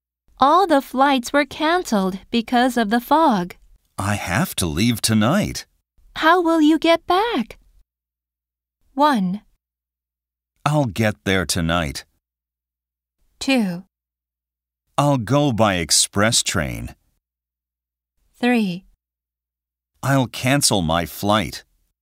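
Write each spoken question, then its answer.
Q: How will you get back?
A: 2: I'll go by express train.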